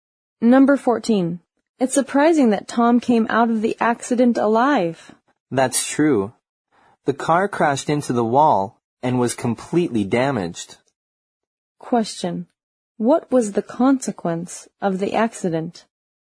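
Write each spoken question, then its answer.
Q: What was the consequence of the accident?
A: The car was completely damaged, but Tom survived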